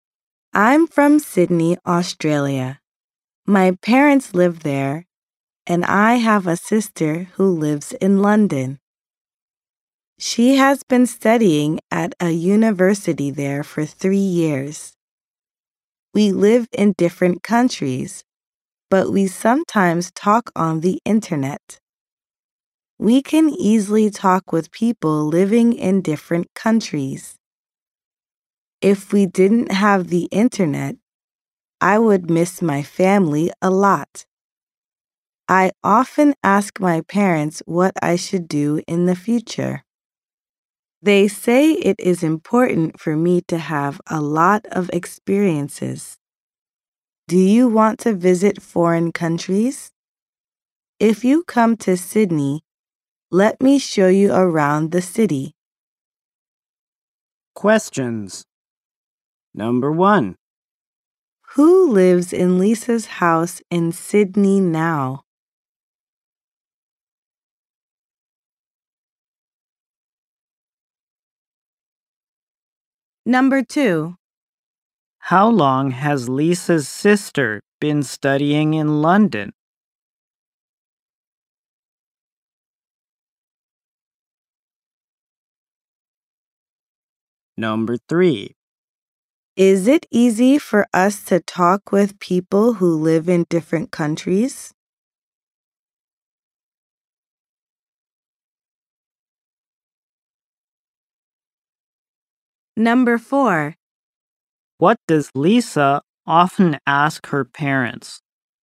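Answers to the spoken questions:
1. Her parents
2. For 3 years
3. Yes, it is
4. What she should do in the future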